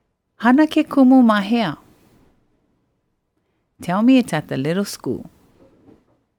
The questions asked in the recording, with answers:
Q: Hana ke kumu mahea.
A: hana ke kumu ma ke la kula li'ili'i.